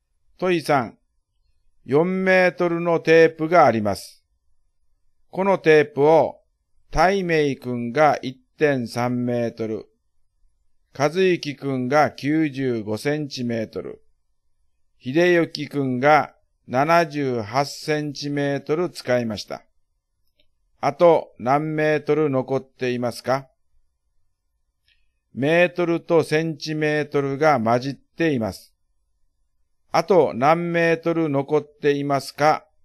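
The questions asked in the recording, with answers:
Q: あと何メートル残っていますか?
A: 0.97メートル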